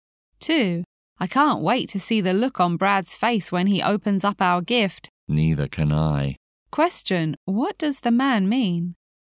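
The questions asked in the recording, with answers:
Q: what does the man mean?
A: He is also eager to see Brad's reaction to the gift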